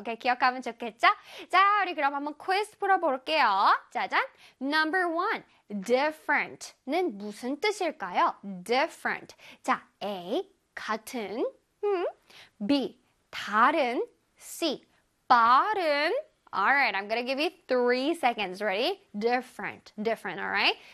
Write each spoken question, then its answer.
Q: different는 무슨 뜻일까요?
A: 정답은 짜잔 다른이겠죠?